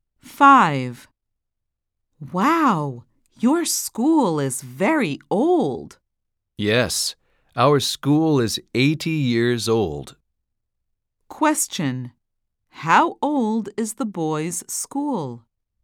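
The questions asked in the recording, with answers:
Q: How old is the boys' school?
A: 80 years old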